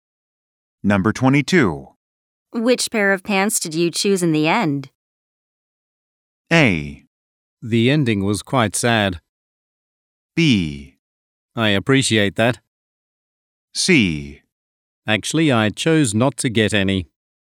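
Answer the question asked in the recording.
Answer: C: Actually, I chose not to get any.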